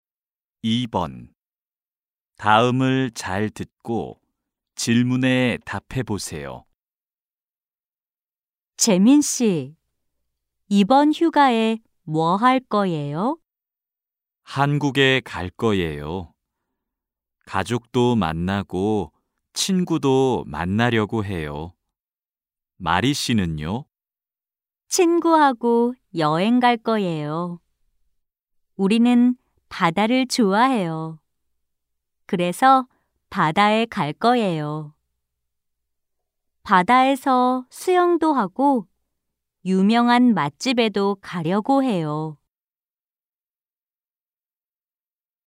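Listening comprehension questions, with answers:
[14-1~14-2] 다음을 잘 듣고 질문에 답해 보세요.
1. 마리 씨는 휴가에 어디에 가려고 해요?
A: 바다

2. 재민 씨는 휴가에 무엇을 하려고 해요?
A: 한국에 가서 가족과 친구를 만나려고 해요

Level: 1B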